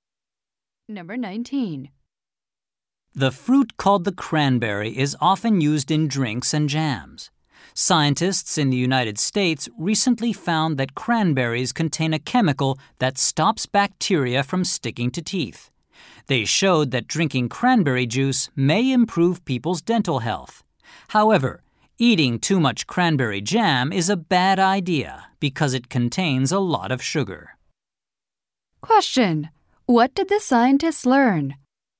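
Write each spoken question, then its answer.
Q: What did the scientists learn?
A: Cranberries contain a chemical that stops bacteria sticking to teeth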